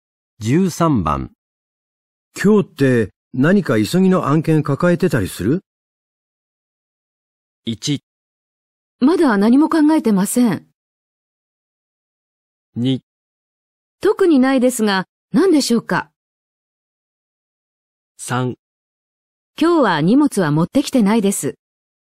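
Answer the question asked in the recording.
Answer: 2: 特にないですが、何でしょうか?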